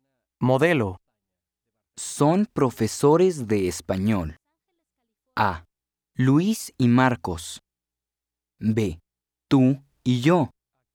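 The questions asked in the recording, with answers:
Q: Son profesores de español.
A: A: Luis y Marcos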